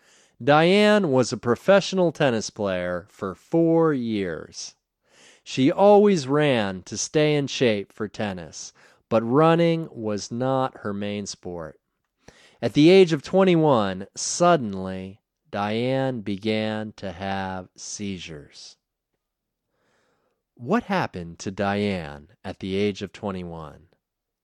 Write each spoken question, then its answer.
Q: What happened to Diane at the age of 21?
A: At the age of 21, Diane suddenly began to have seizures.